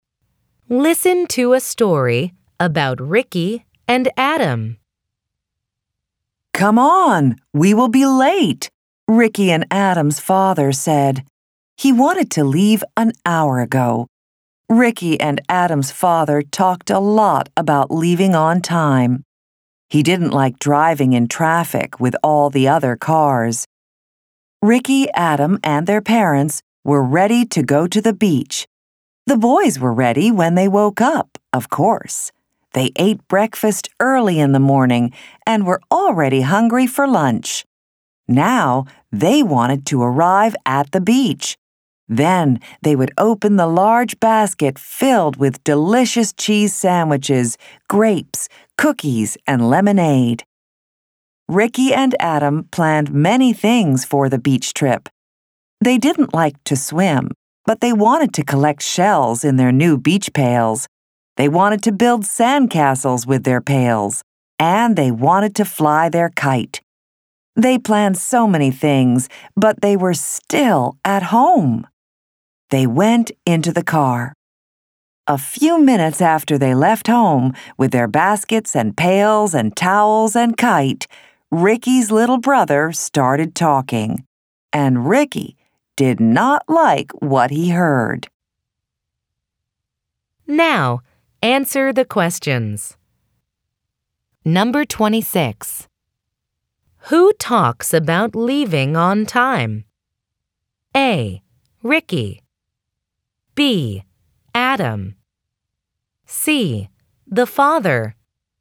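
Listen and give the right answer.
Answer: C: The father.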